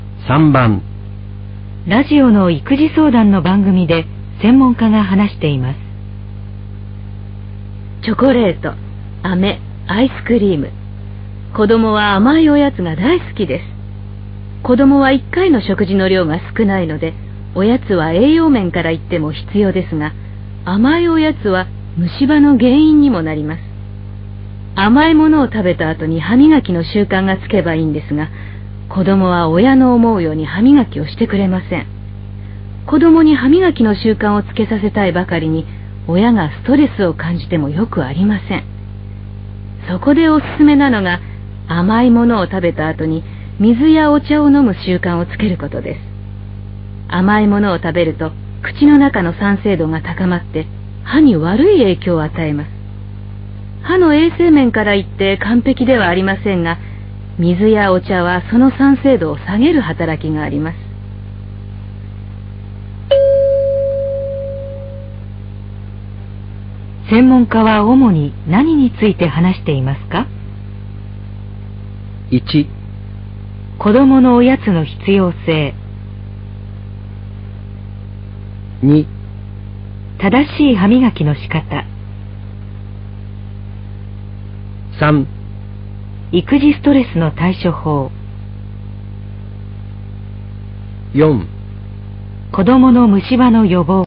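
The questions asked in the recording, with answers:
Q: 専門家は主に何について話していますか?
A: 4: 子どもの虫歯の予防。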